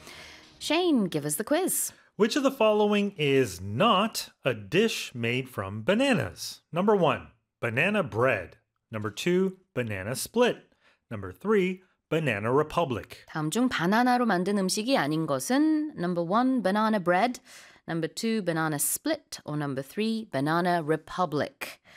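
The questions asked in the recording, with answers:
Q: Which of the following is not a dish made from bananas?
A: 3: banana republic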